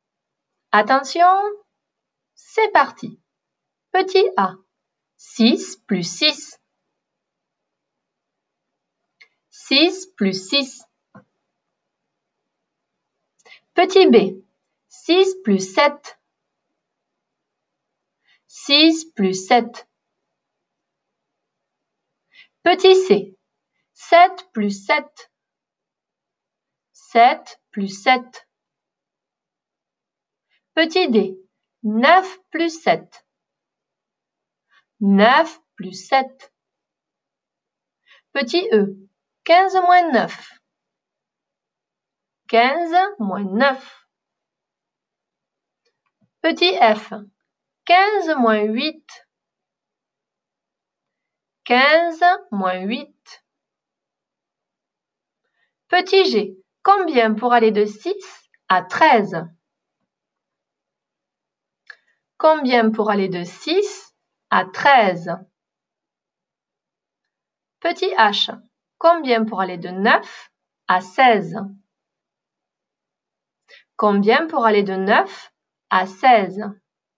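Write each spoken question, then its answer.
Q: 6 plus 6.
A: 12

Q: 6 plus 7.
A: 13

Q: 7 plus 7.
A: 14

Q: 9 plus 7.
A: 16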